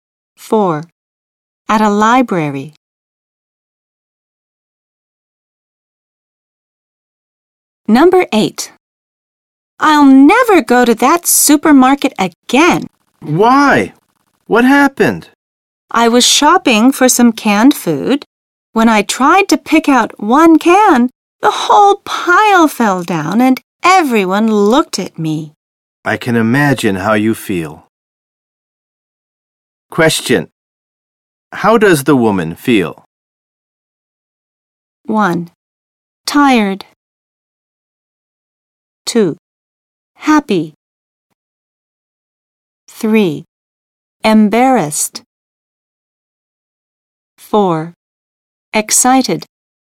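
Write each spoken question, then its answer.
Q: How does the woman feel?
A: 3: Embarrassed.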